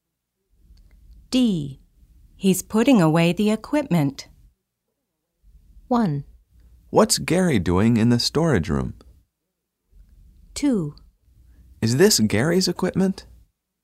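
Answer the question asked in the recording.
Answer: 1: What's Gary doing in the storage room?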